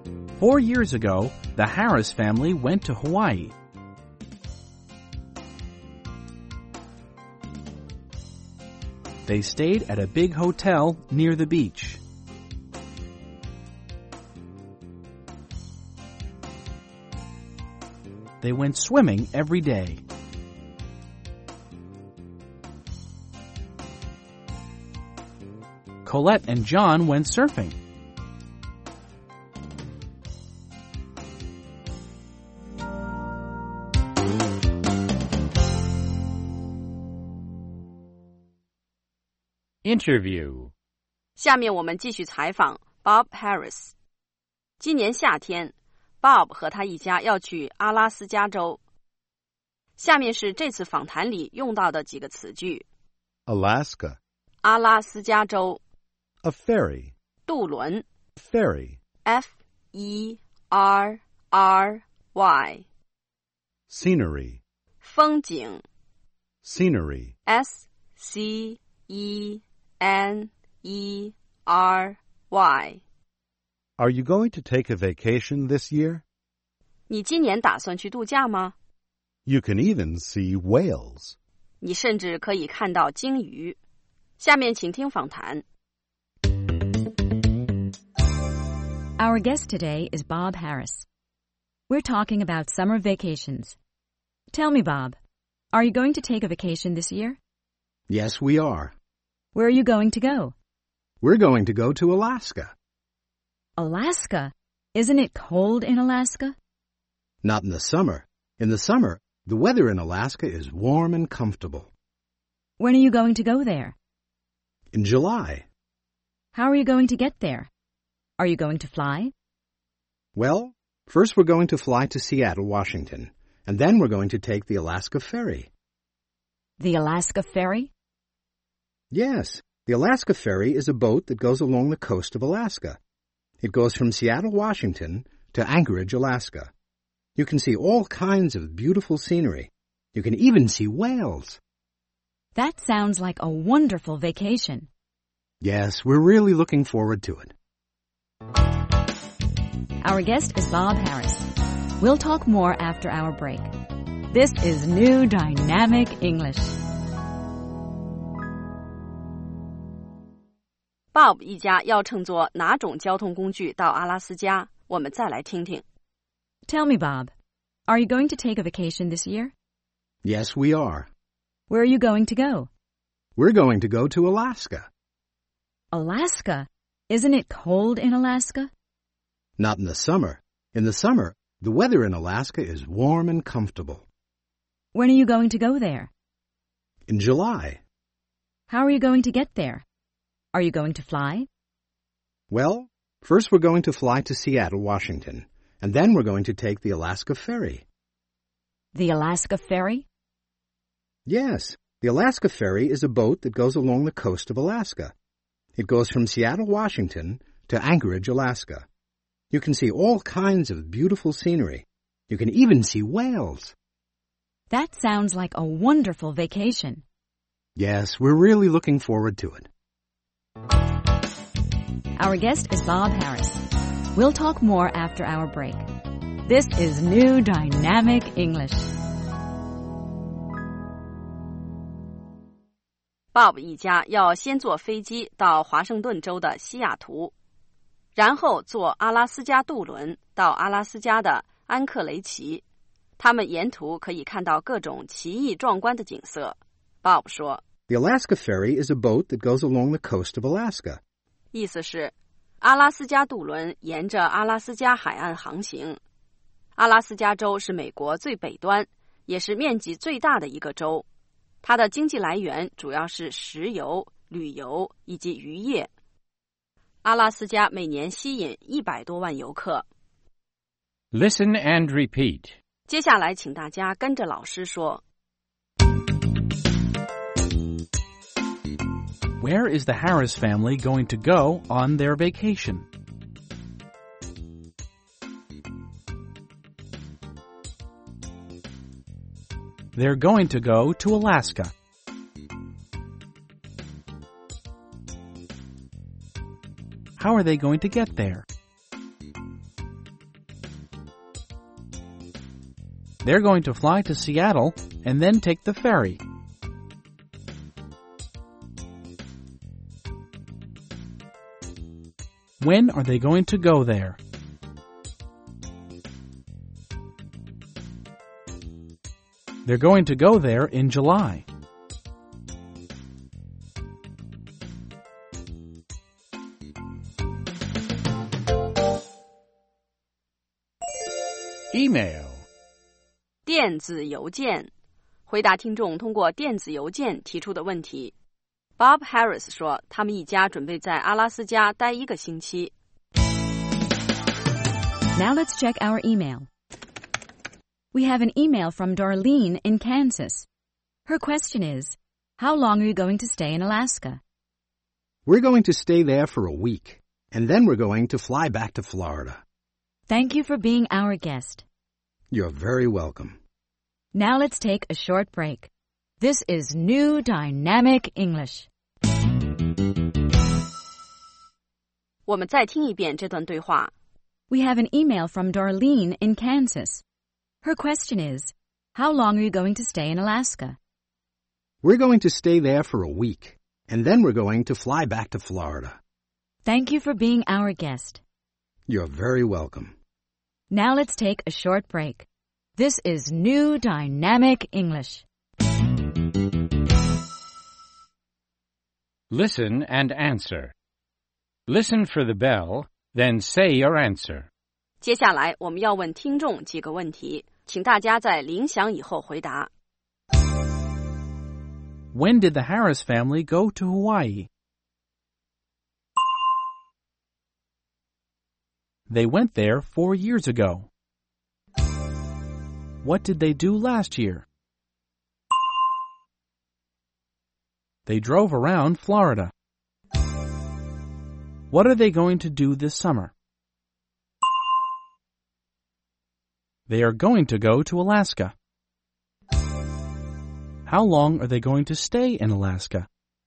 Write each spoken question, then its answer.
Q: When did the Harris family go to Hawaii?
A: They went there 4 years ago.

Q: What did they do last year?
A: They drove around Florida.

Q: How long are they going to stay in Alaska?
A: They're going to stay there for 1 week.